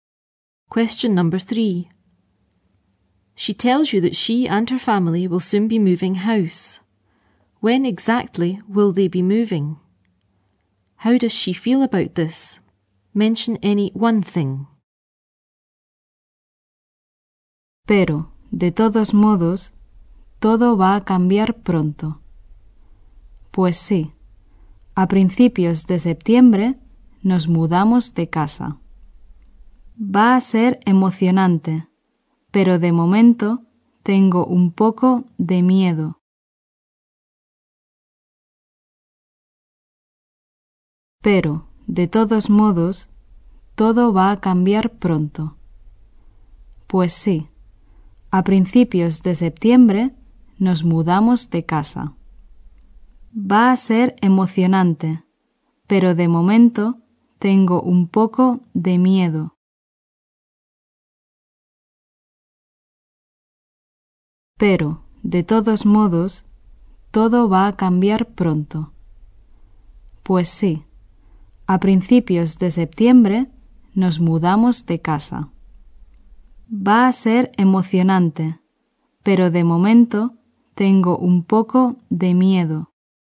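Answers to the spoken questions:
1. At the beginning of September
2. Excited, but a bit scared at the moment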